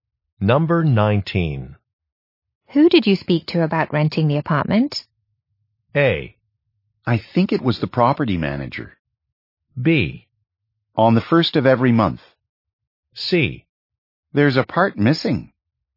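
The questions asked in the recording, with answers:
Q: Who did you speak to about renting the apartment?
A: A: I think it was the property manager.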